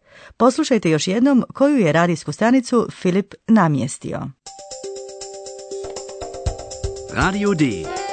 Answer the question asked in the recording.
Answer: je bio Radio D.